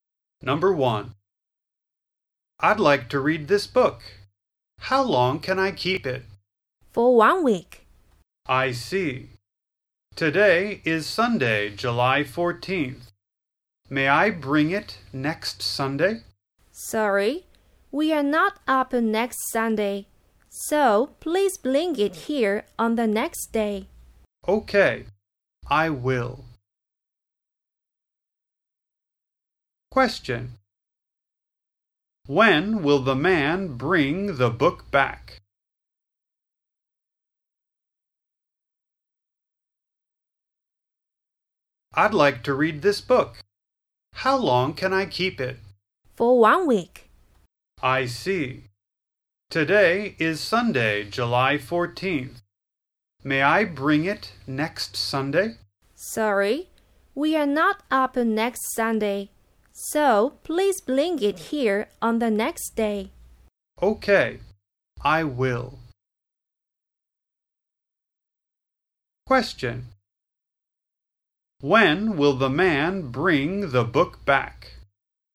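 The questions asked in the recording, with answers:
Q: When will the man bring the book back?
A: On Monday, July 22nd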